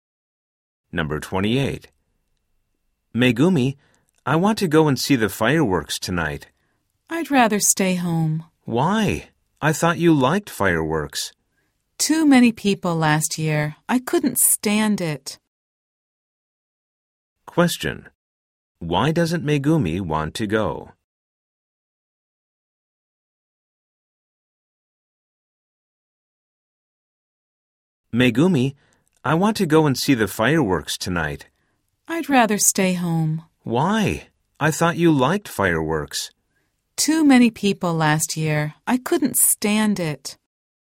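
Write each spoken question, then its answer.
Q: Why doesn't Megumi want to go?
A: There were too many people last year.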